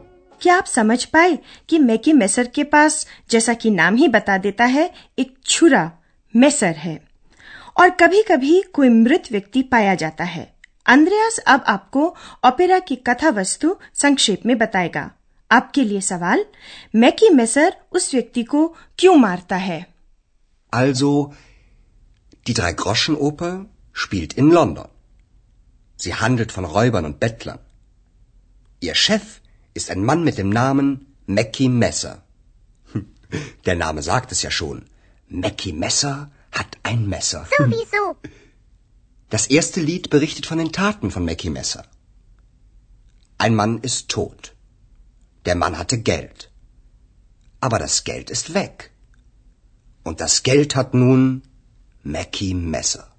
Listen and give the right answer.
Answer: मैकी measure ने उस व्यक्ति की हत्या इसलिए की कि उसके पास धन था